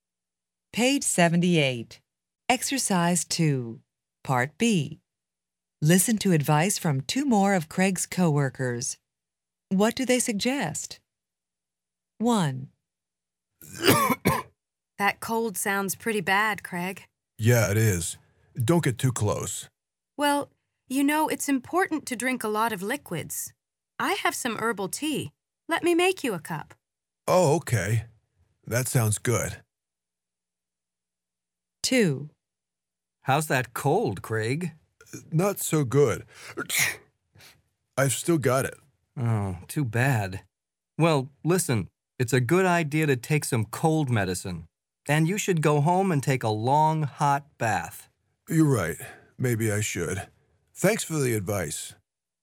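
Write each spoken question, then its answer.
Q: What do they suggest?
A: Drink a lot of liquids, like herbal tea.

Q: What do they suggest?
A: Take some cold medicine, go home and take a long, hot bath.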